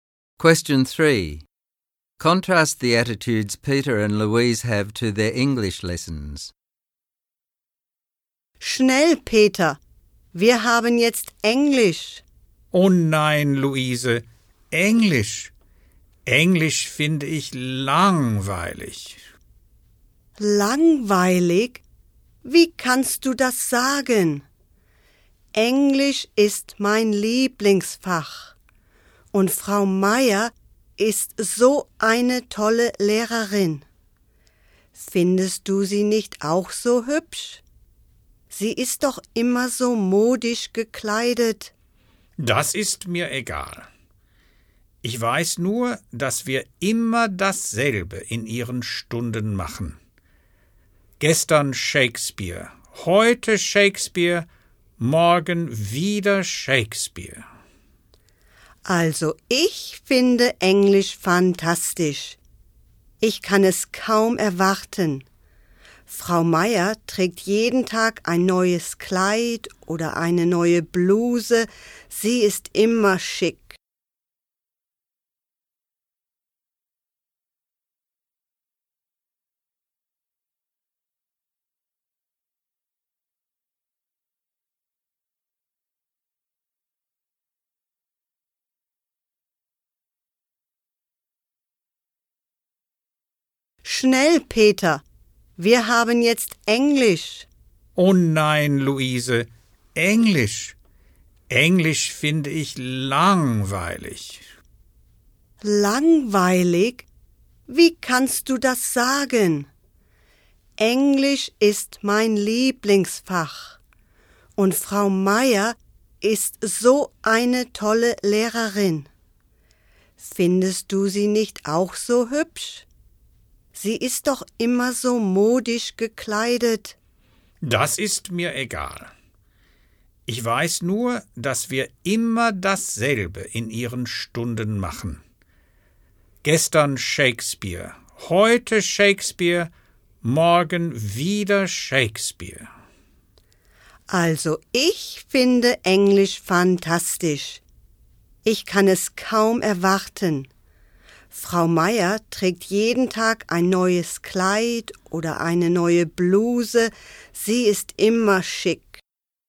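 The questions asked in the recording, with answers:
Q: Contrast the attitudes Peter and Louise have to their English lessons.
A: Peter finds English boring because they always do the same thing (Shakespeare); Luise loves it, it's her favourite subject and she admires the stylish teacher Frau Meier.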